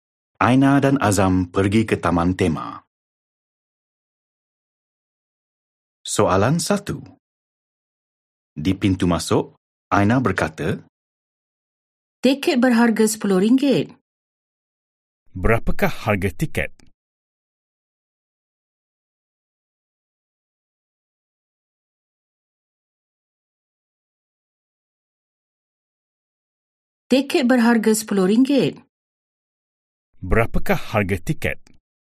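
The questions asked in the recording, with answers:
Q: Berapakah harga tiket?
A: RM10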